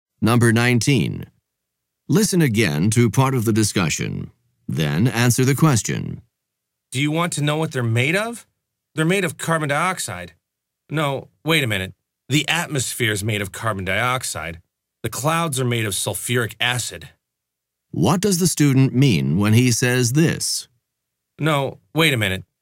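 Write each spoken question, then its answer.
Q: What does the student mean when he says this?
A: He realizes he made a mistake and corrects himself: the atmosphere, not the clouds, is made of carbon dioxide.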